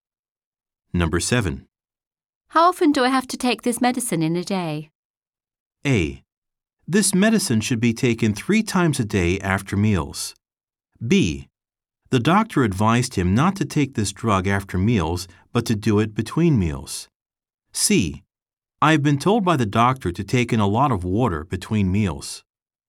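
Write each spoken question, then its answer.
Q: How often do I have to take this medicine in a day?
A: A: This medicine should be taken 3 times a day after meals.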